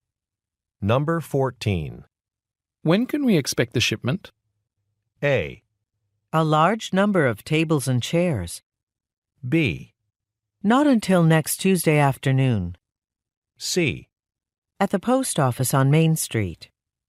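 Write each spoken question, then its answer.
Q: When can we expect the shipment?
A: B: Not until next Tuesday afternoon.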